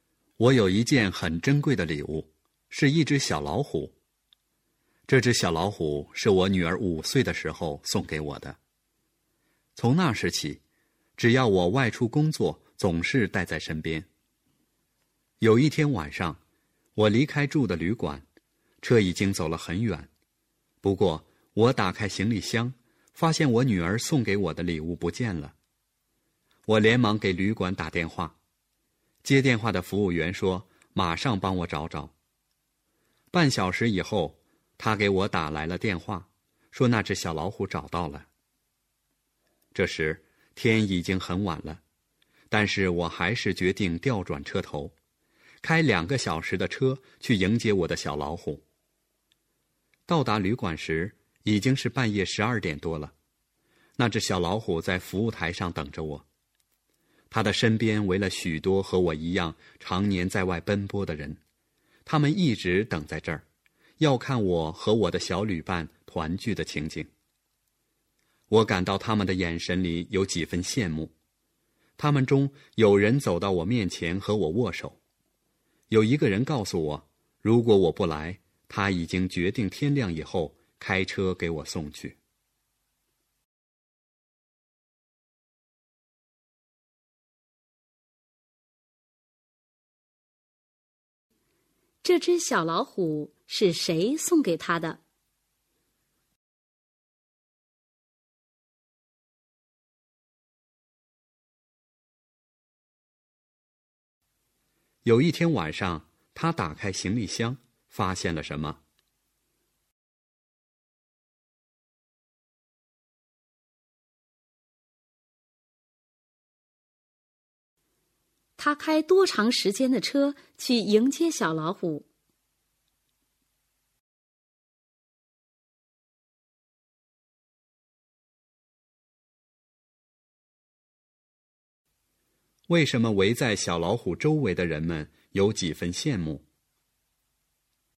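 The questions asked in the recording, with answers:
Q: 这只小老虎是谁送给他的?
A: 他女儿

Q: 有一天晚上,他打开行李箱,发现了什么?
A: 女儿送的小老虎不见了

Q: 他开多长时间的车去迎接小老虎?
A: 2个小时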